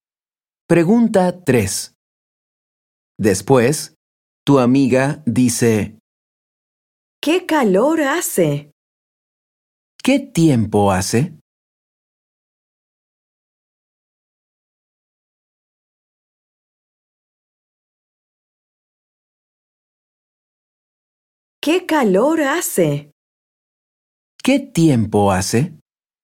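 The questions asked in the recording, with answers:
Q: ¿Qué tiempo hace?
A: hace calor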